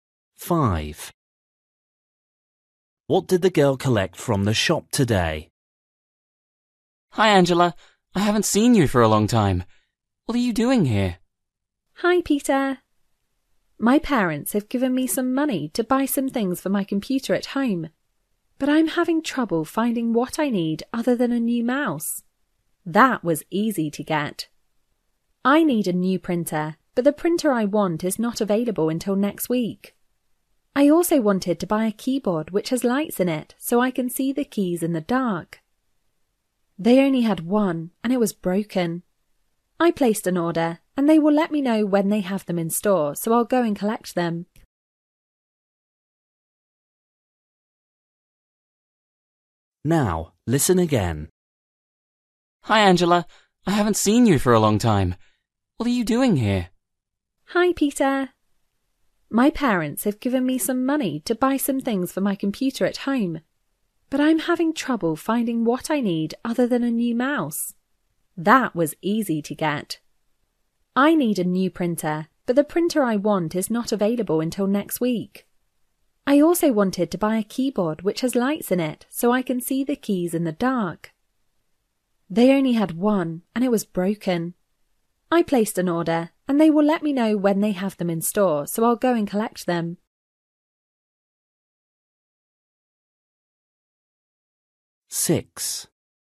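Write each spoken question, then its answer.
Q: What did the girl collect from the shop today?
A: a new mouse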